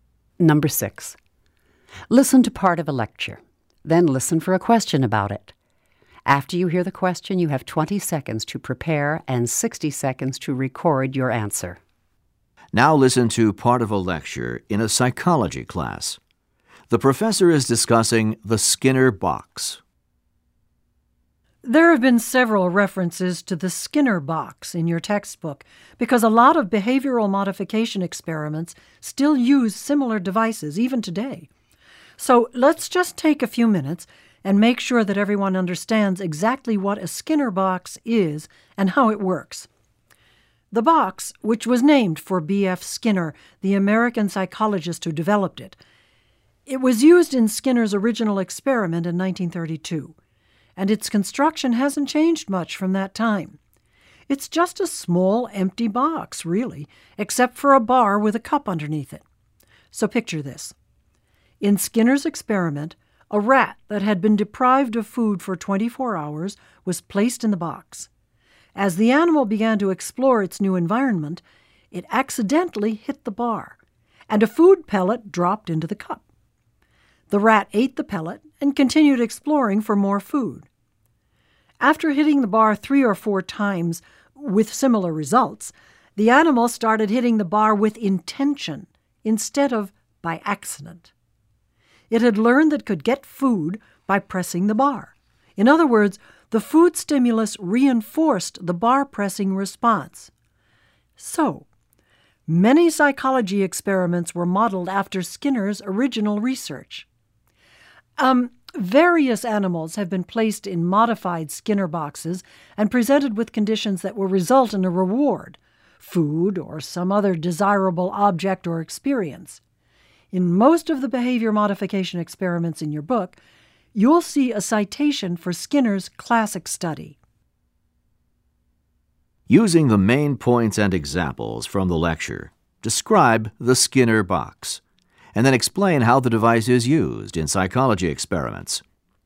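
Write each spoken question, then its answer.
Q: Using the main points and examples from the lecture, describe the Skinner box, and then explain how the device is used in psychology experiments.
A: It is a small, empty box with a bar and a cup under it. A hungry rat hit the bar by accident, got a food pellet, and learned to press the bar on purpose, because the food reinforced the response. Experiments use modified boxes that reward animals for certain behavior.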